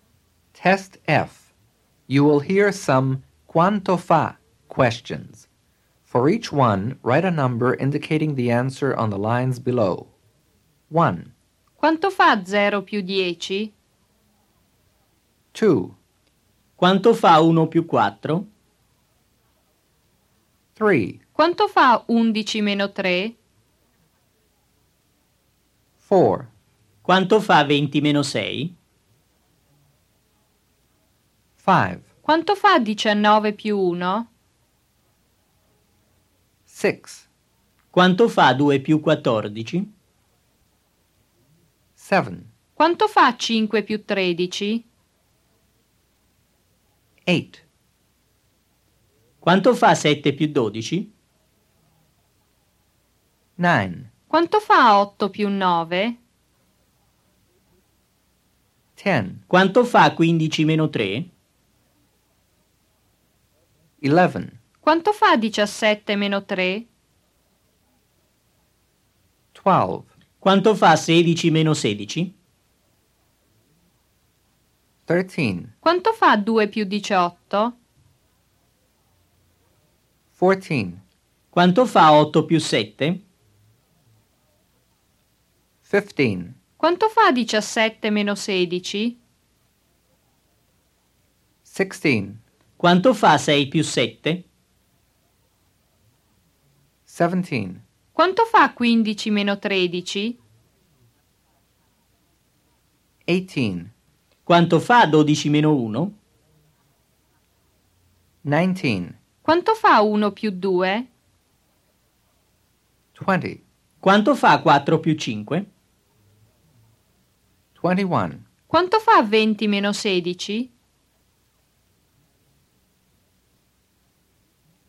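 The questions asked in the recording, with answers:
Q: Quanto fa 0 più 10?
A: 10

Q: Quanto fa 20 meno 6?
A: 14

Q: Quanto fa 19 più 1?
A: 20

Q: Quanto fa 2 più 14?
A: 16

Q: Quanto fa 5 più 13?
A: 18

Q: Quanto fa 7 più 12?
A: 19

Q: Quanto fa 8 più 9?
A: 17

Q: Quanto fa 15 meno 3?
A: 12

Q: Quanto fa 17 meno 3?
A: 14

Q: Quanto fa 2 più 18?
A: 20

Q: Quanto fa 8 più 7?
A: 15

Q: Quanto fa 6 più 7?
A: 13

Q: Quanto fa 12 meno 1?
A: 11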